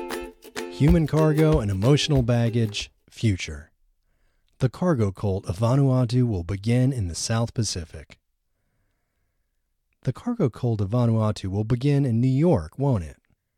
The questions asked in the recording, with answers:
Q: The cargo cult of Vanuatu will begin in New York, won't it?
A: No, the cargo cult of Vanuatu won't begin in New York.